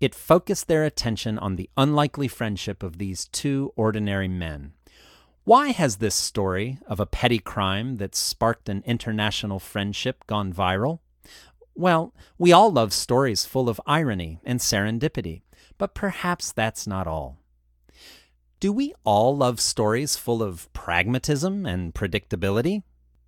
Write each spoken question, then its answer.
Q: Do we all love stories full of pragmatism and predictability?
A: No, we all love stories full of irony and serendipity.